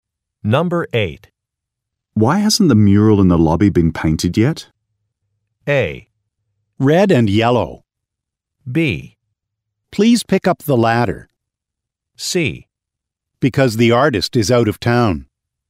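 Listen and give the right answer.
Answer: C: Because the artist is out of town.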